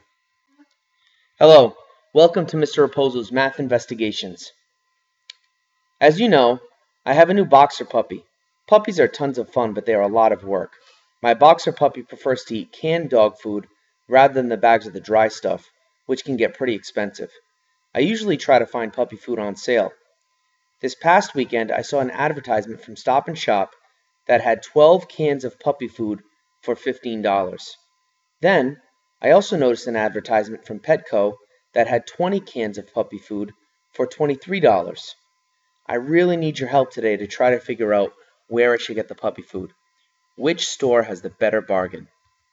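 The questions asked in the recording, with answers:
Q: Which store has the better bargain?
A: Petco ($1.15 per can vs $1.25 per can at Stop & Shop)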